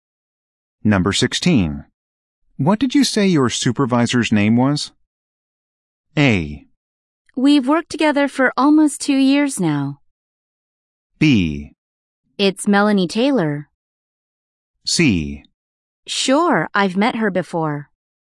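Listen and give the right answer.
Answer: B: It's Melanie Taylor.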